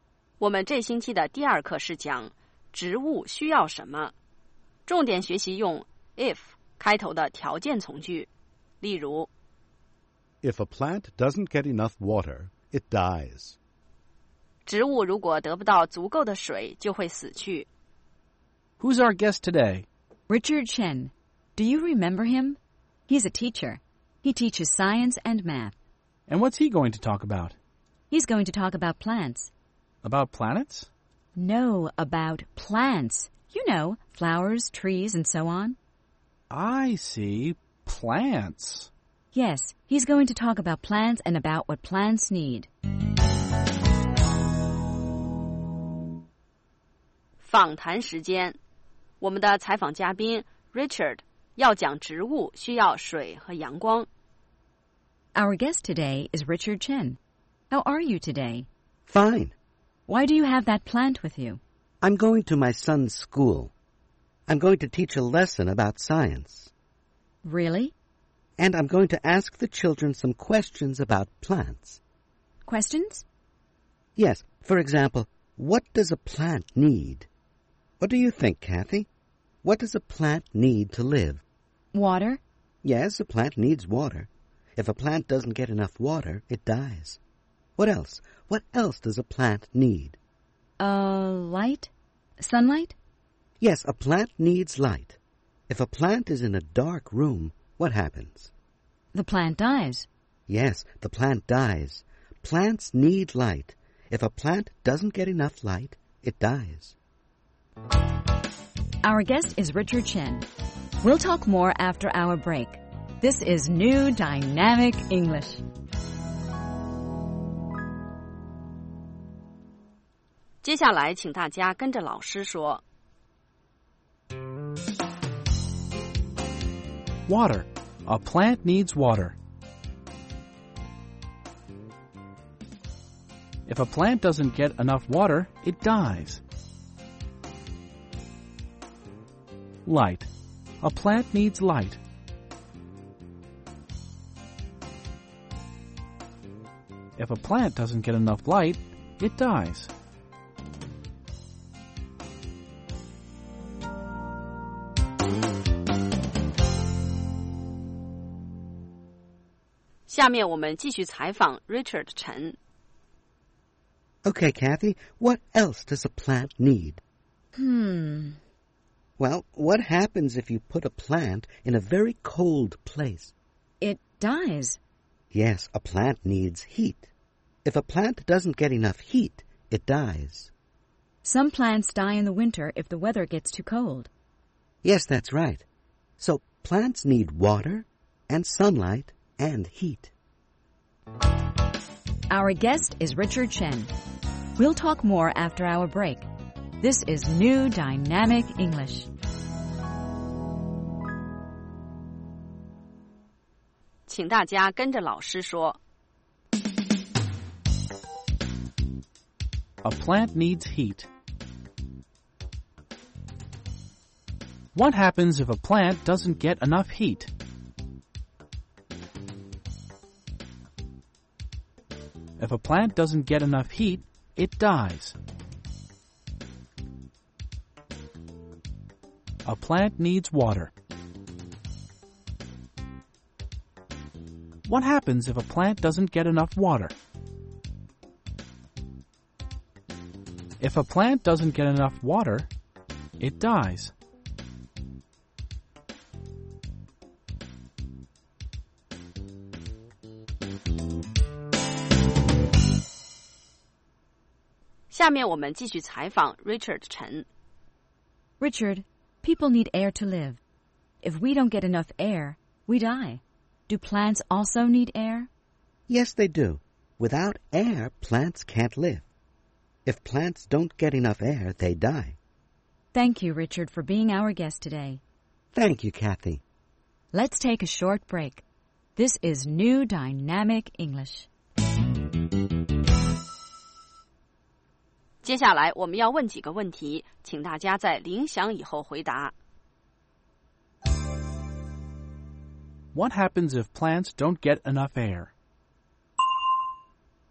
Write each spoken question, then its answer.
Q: What happens if plants don't get enough air?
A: They die. If plants don't get enough air, they die.